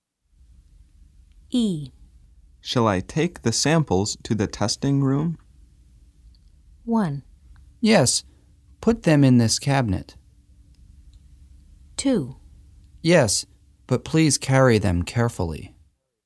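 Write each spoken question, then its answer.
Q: Shall I take the samples to the testing room?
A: 2: Yes, but please carry them carefully.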